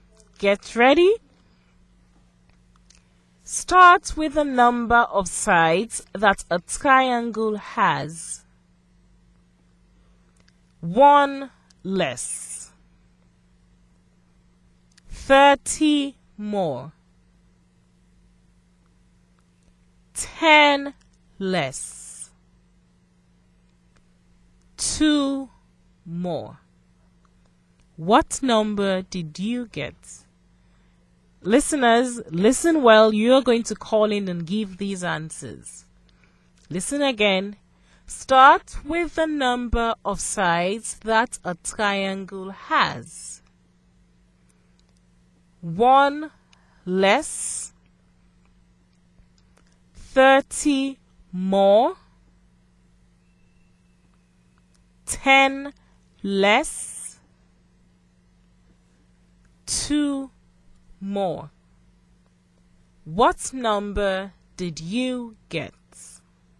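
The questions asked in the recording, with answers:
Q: What number did you get?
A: 24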